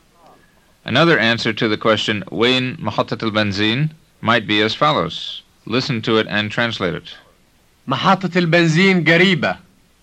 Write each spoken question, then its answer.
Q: Listen to it and translate it.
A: It means the gas station is nearby.